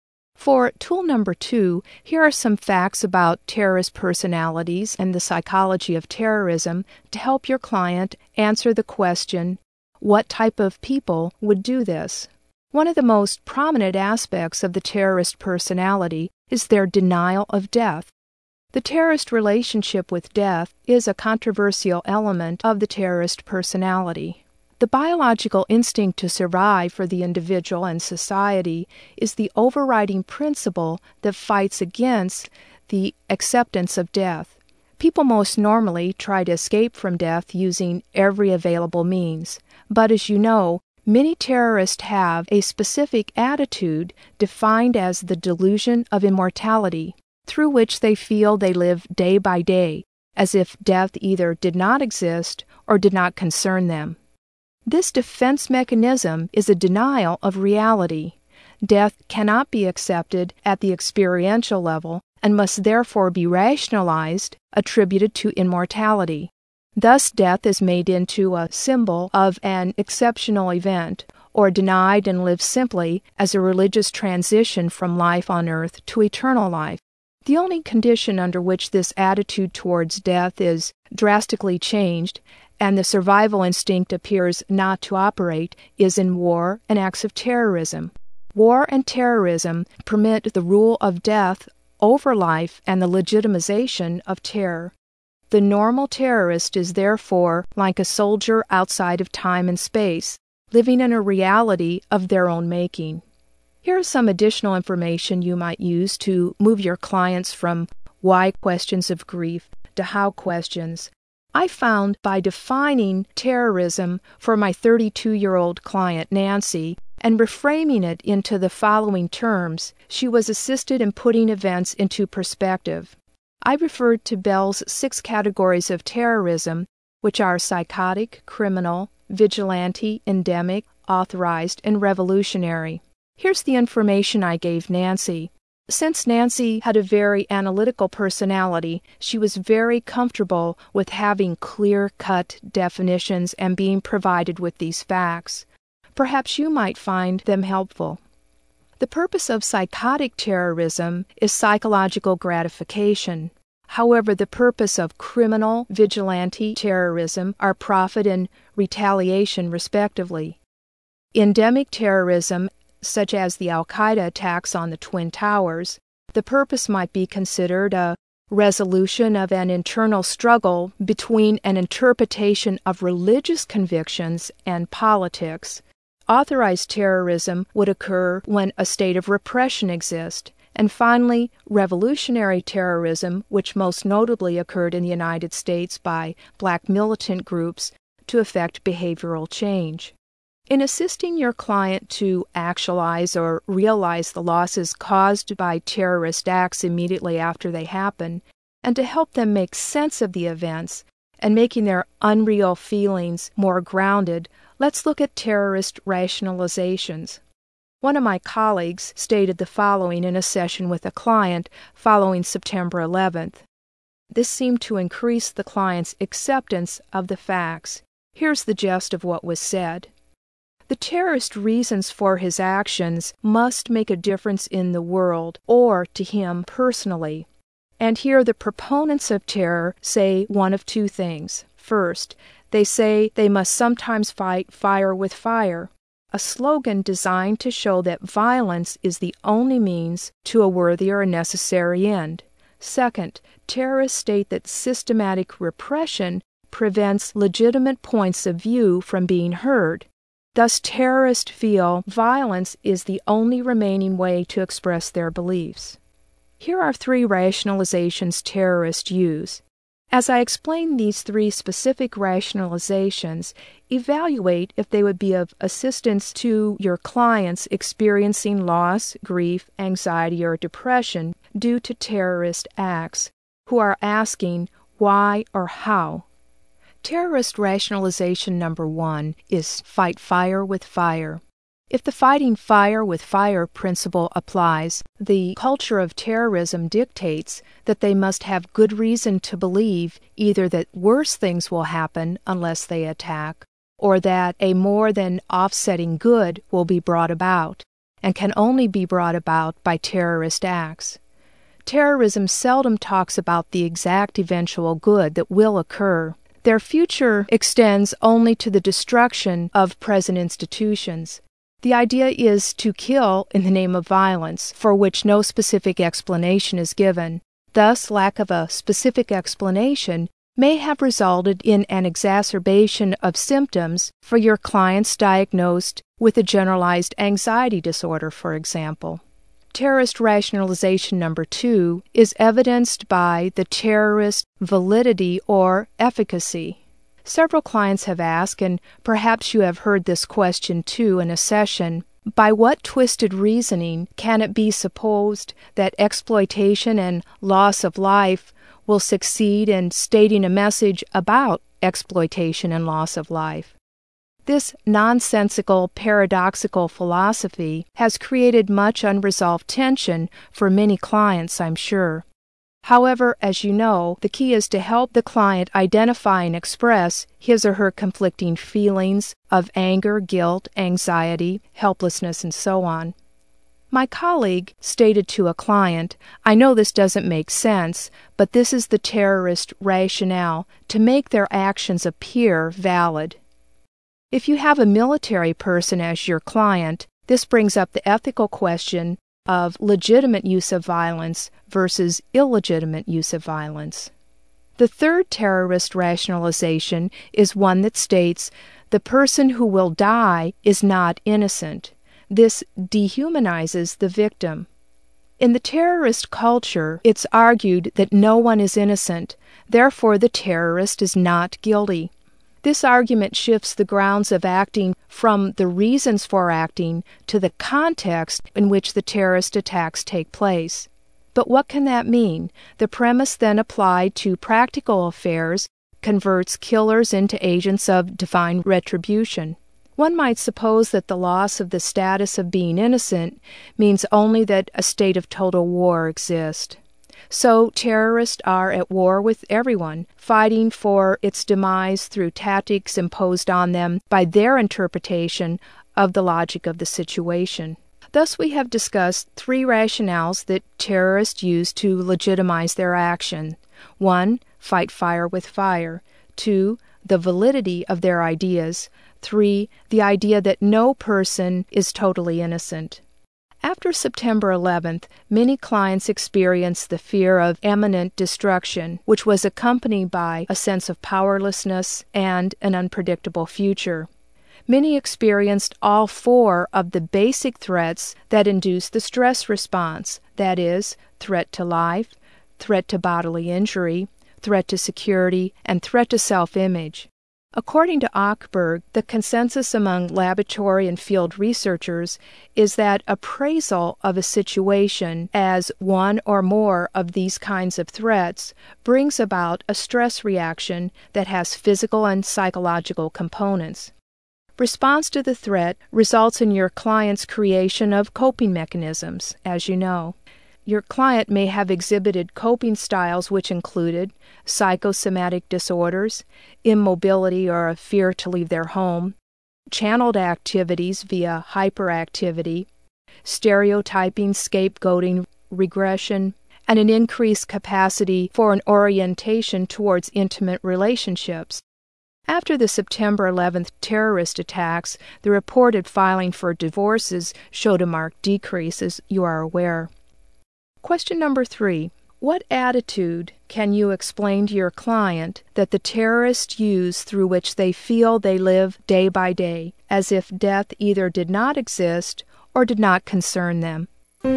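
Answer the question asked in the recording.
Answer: The delusion of immortality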